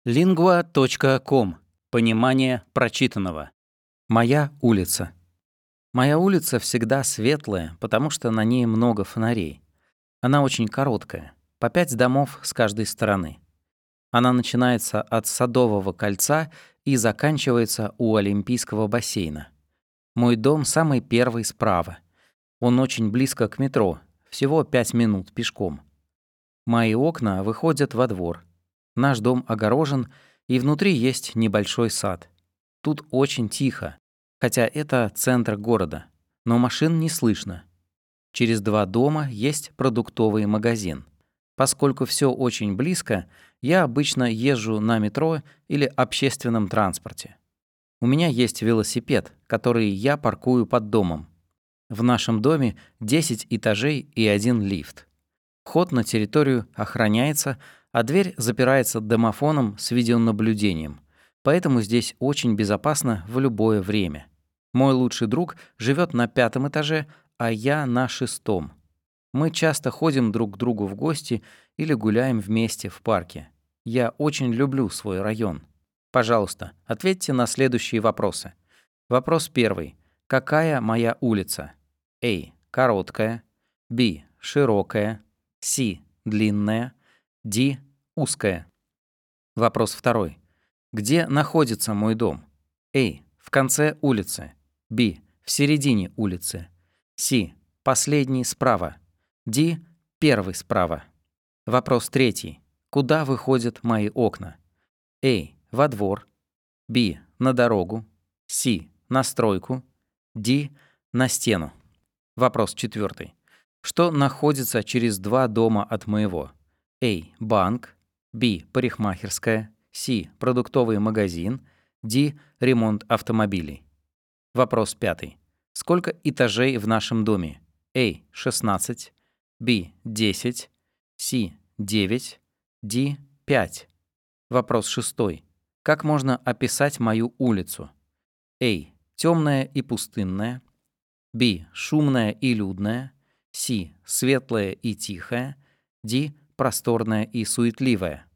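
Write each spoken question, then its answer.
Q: Какая моя улица?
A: A: Короткая

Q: Где находится мой дом?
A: D: Первый справа

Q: Куда выходят мои окна?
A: A: Во двор

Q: Что находится через 2 дома от моего?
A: C: Продуктовый магазин

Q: Сколько этажей в нашем доме?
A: B: 10

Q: Как можно описать мою улицу?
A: C: Светлая и тихая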